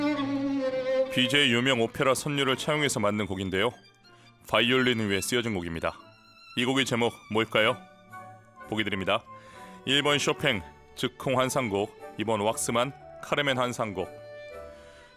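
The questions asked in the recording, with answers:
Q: 이 곡의 제목 뭘까요?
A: 2번: 왁스만, 카르멘 환상곡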